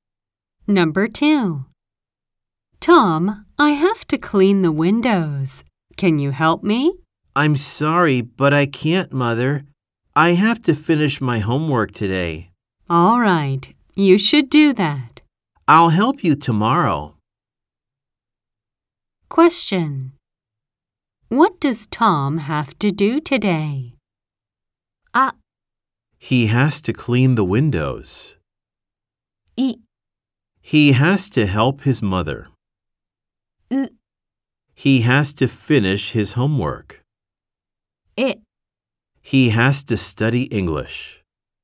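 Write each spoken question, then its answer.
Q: What does Tom have to do today?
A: う: He has to finish his homework.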